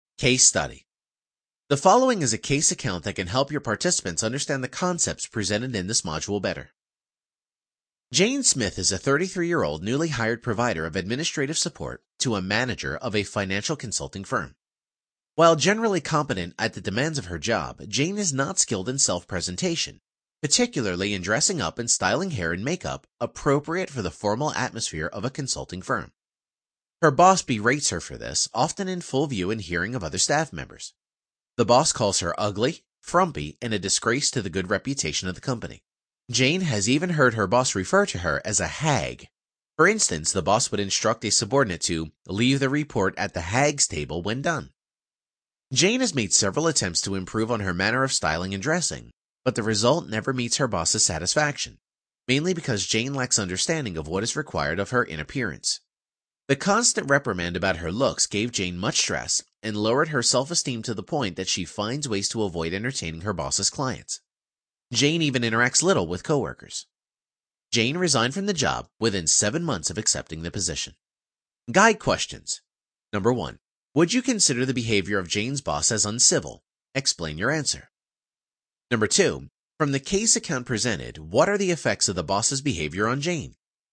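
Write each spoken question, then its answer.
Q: From the case account presented, what are the effects of the boss's behavior on Jane?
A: She became very stressed and lost self-esteem, avoided her boss's clients, interacted little with coworkers, and resigned within 7 months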